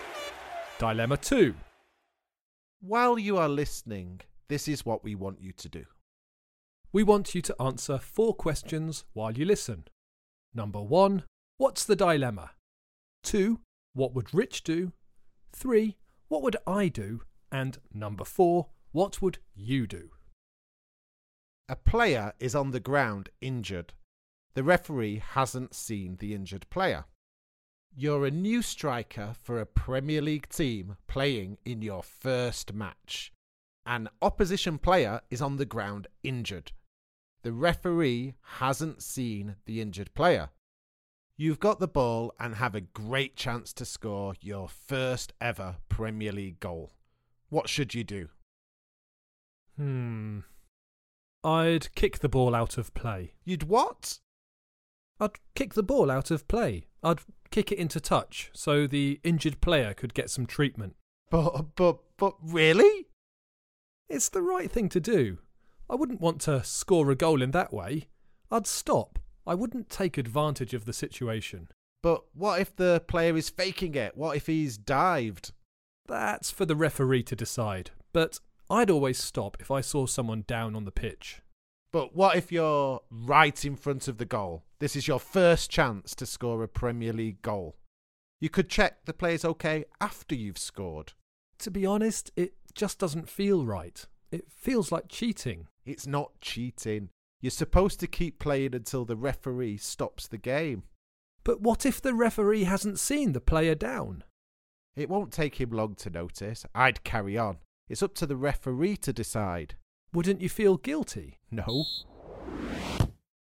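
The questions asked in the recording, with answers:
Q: what's the dilemma?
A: Whether to keep playing and score his first goal or kick the ball out so the injured opposing player can get treatment

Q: what would Rich do?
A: Carry on playing; it's up to the referee

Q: what would I do?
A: Kick the ball out of play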